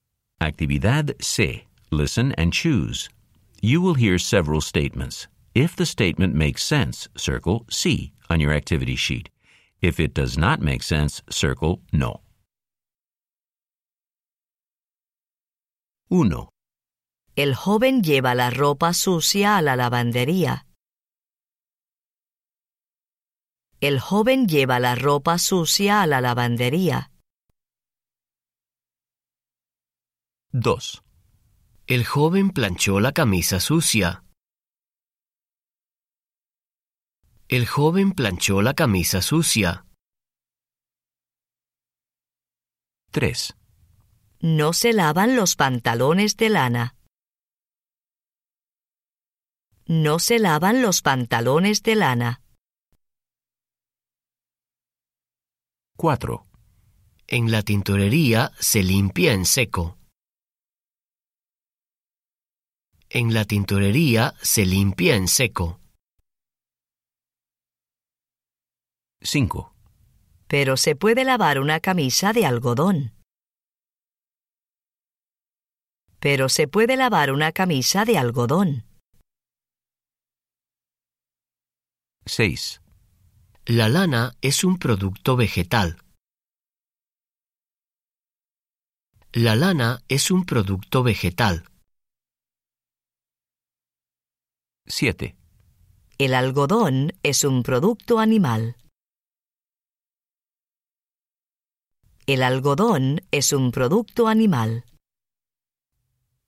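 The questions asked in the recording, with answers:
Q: El joven lleva la ropa sucia a la lavandería.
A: sí

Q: En la tintorería se limpia en seco.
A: sí

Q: Pero se puede lavar una camisa de algodón.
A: sí

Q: La lana es un producto vegetal.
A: no

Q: El algodón es un producto animal.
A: no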